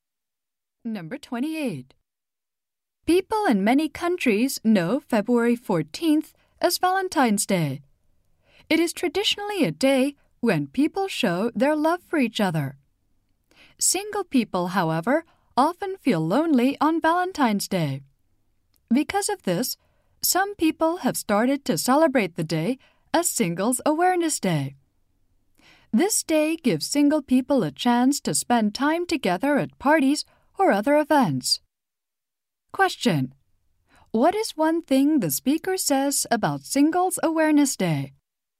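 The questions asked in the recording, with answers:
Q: What is one thing the speaker says about Singles Awareness Day?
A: It gives single people a chance to spend time together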